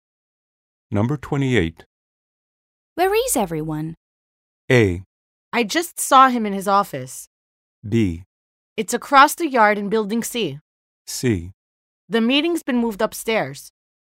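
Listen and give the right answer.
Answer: C: The meeting's been moved upstairs.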